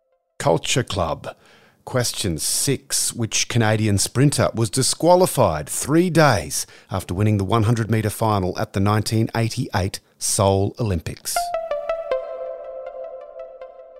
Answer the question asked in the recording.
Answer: Ben Johnson.